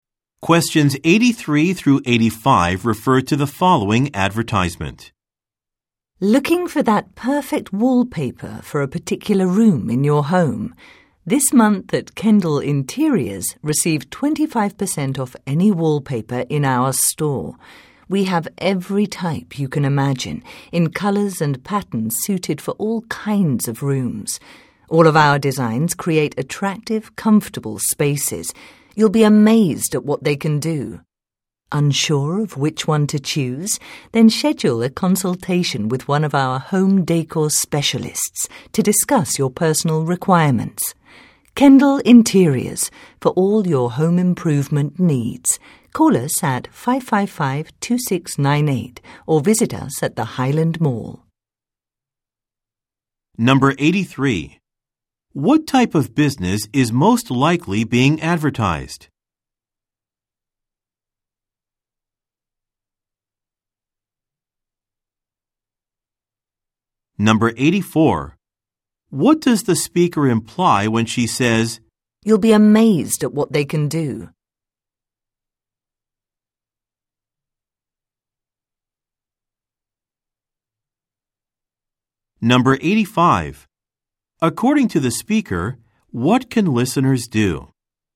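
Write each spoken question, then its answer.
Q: What type of business is most likely being advertised?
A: A home decor store that sells wallpaper

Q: According to the speaker, what can listeners do?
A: Schedule a consultation with a home decor specialist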